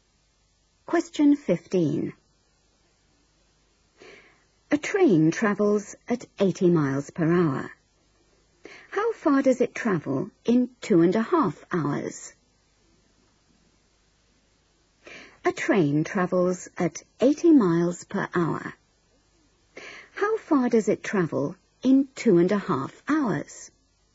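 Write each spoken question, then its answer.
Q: How far does it travel in 2.5 hours?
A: 200 miles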